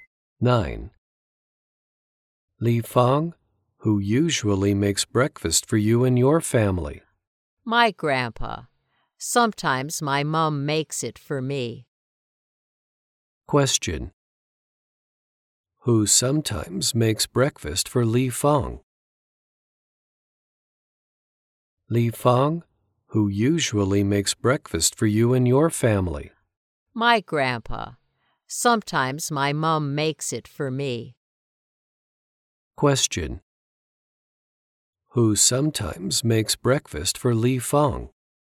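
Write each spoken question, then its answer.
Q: Who sometimes makes breakfast for Li Fang?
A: Her mom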